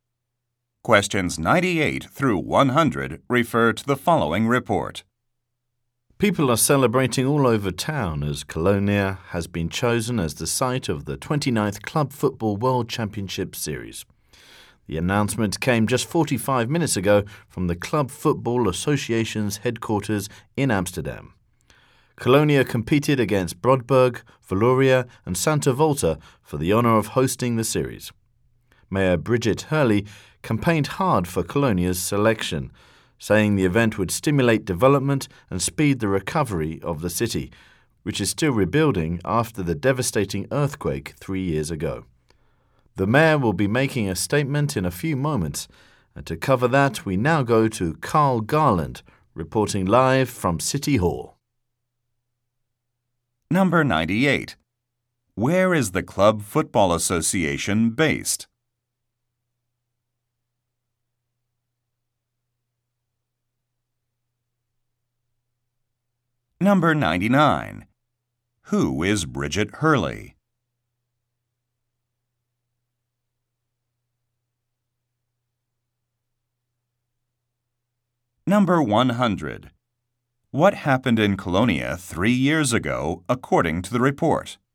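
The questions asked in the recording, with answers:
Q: Where is the Club Football Association based?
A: Amsterdam

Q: Who is Bridget Hurley?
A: The mayor of Colonia

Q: What happened in Colonia 3 years ago, according to the report?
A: An earthquake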